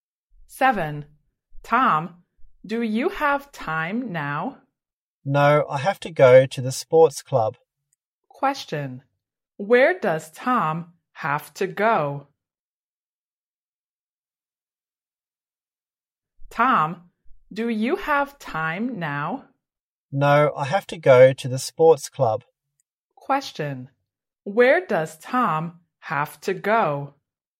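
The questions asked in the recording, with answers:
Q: where does Tom have to go?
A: the sports club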